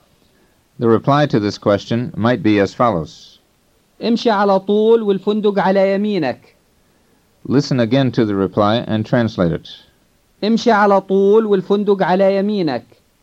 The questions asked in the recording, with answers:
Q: Listen again to the reply and translate it.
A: It means go straight ahead and the hotel is on your right.